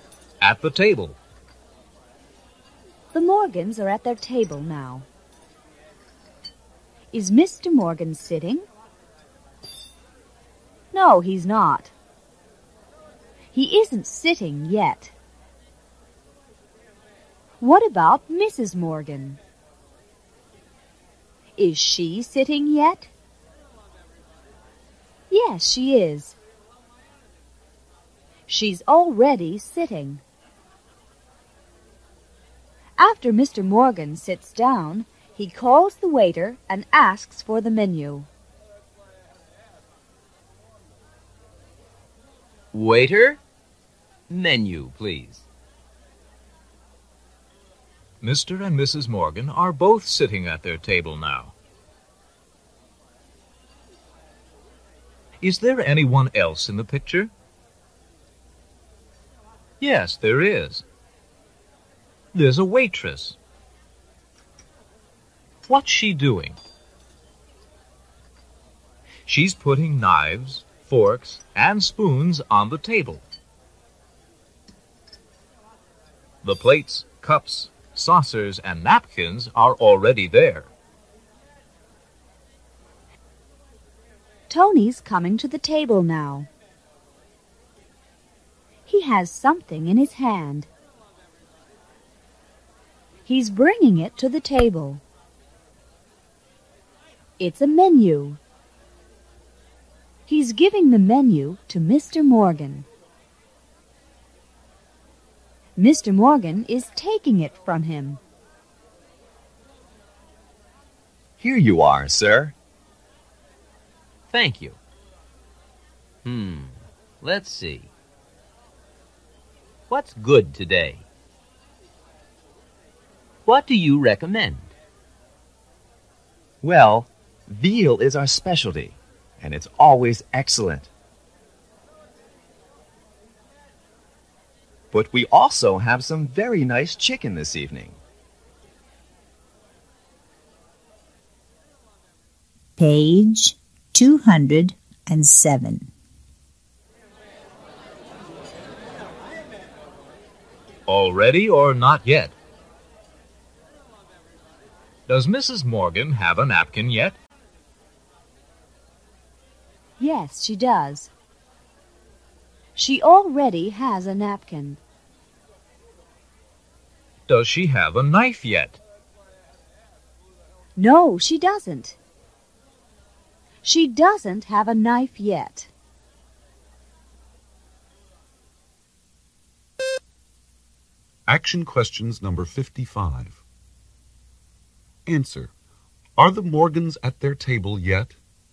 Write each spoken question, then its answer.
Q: Are the Morgans at their table yet?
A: Yes, they are.